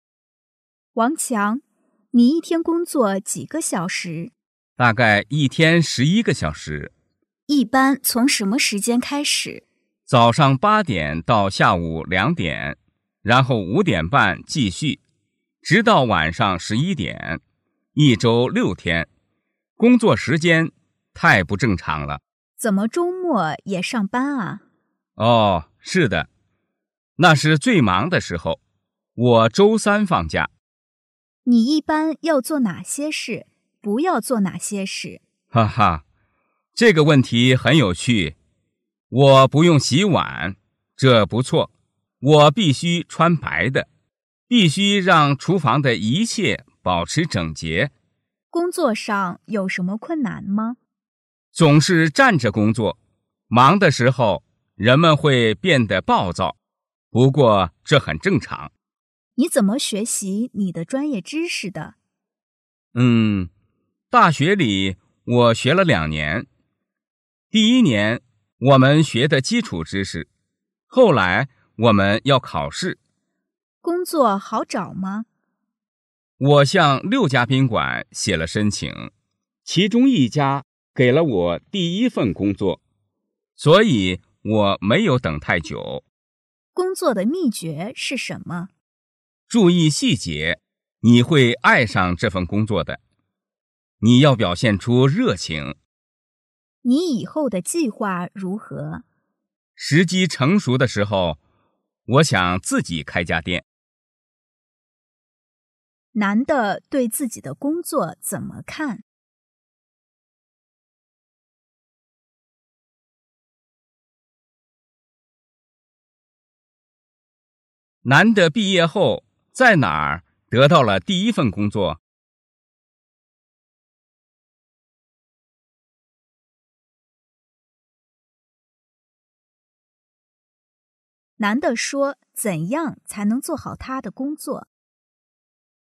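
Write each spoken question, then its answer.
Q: 男的毕业后在哪儿得到了第一份工作?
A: 在一家宾馆

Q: 男的说怎样才能做好他的工作?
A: 注意细节,表现出热情

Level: 汉语水平考试(MHK)三级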